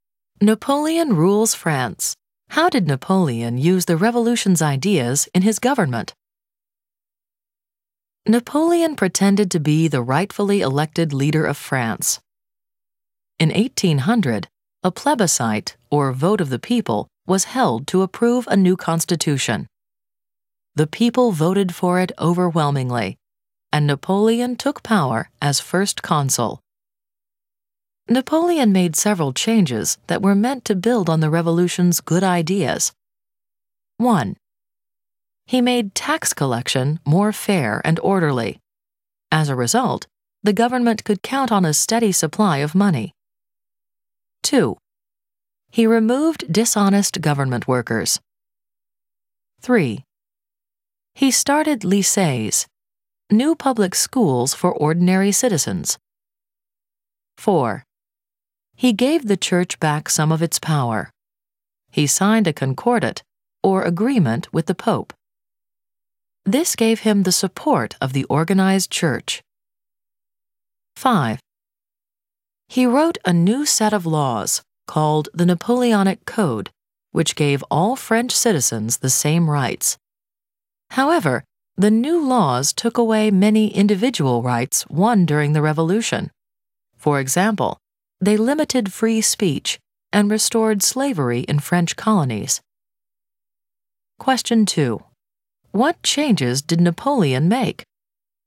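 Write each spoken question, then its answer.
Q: What changes did Napoleon make?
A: Fairer tax collection, removed dishonest workers, started lycées, concordat with the Pope, Napoleonic Code.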